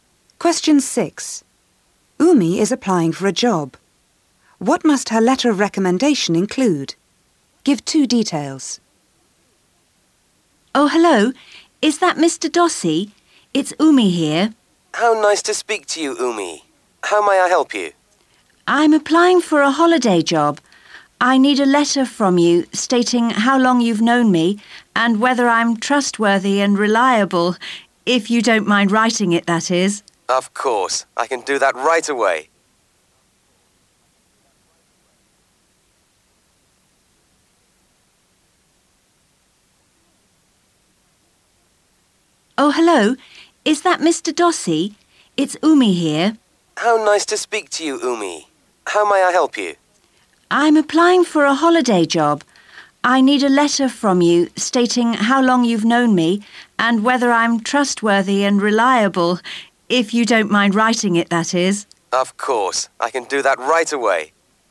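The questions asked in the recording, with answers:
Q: What must her letter of recommendation include?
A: How long he has known her, and whether she is trustworthy and reliable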